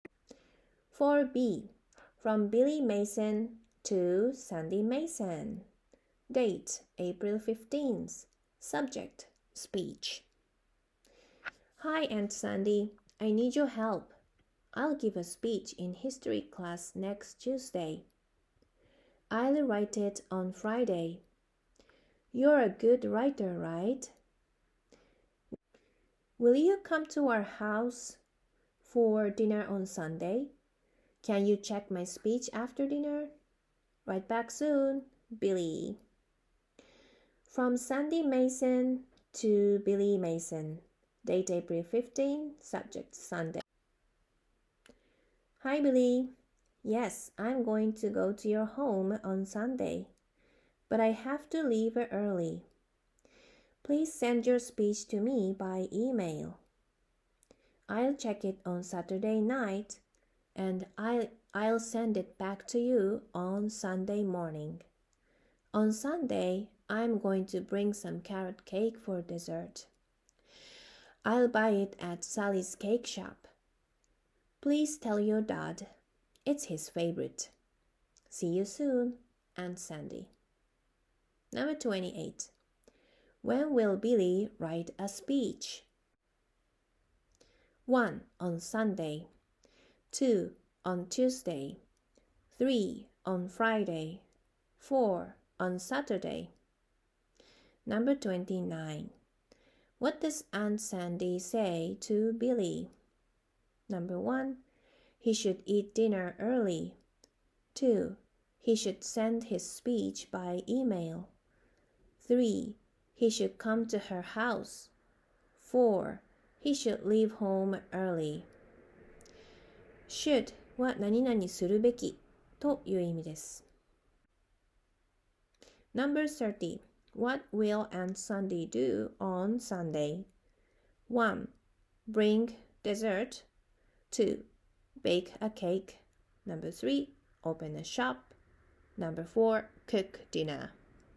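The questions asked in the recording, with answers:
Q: When will Billy write a speech?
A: 3: On Friday.

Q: What does Aunt Sandy say to Billy?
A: 2: He should send his speech by email.

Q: What will Aunt Sandy do on Sunday?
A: 1: Bring dessert.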